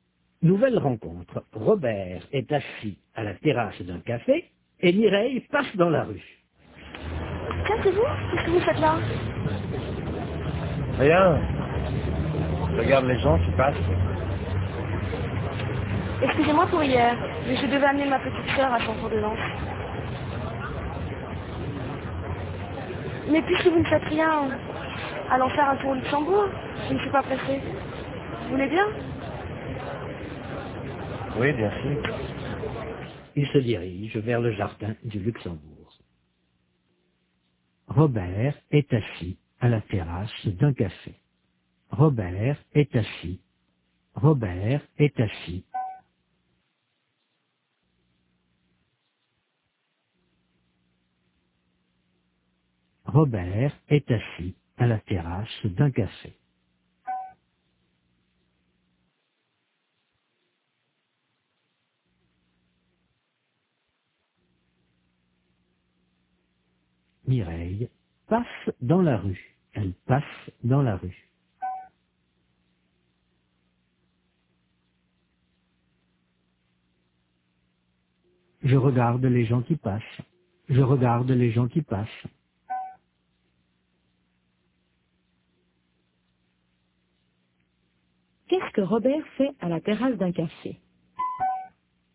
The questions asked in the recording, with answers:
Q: Qu'est-ce que Robert fait à la terrasse d'un café ?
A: Il regarde les gens qui passent.